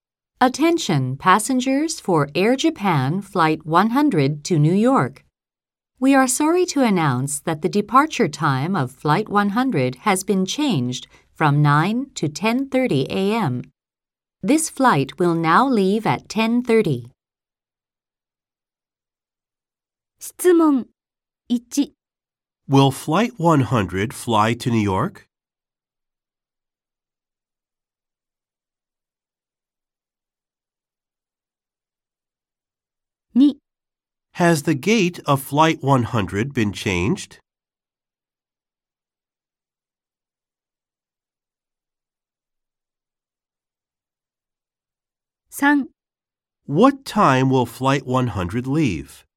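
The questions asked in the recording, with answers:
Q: Will Flight 100 fly to New York?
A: Yes, it will.

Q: What time will Flight 100 leave?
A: At 10:30 a.m.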